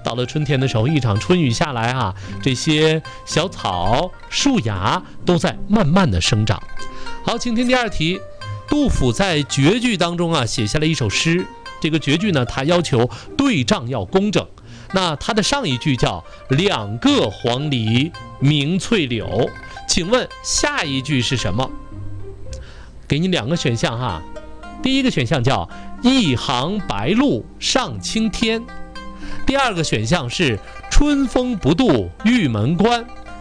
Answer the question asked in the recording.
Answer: 第一个。